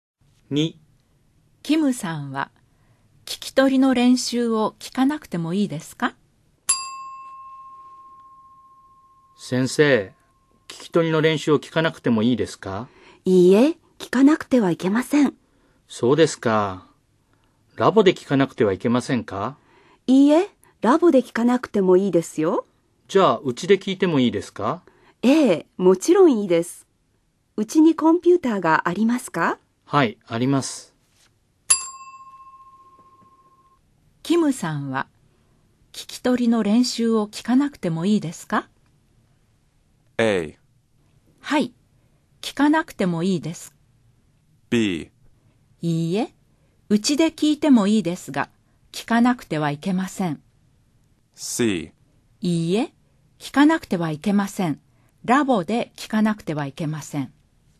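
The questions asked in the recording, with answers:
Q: キムさんは、聞き取りの練習を聞かなくてもいいですか?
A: B: いいえ、うちで聞いてもいいですが、聞かなくてはいけません。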